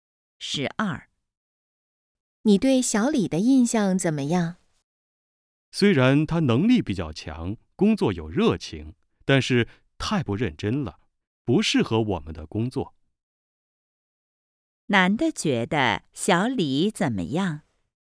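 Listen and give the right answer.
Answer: 太不认真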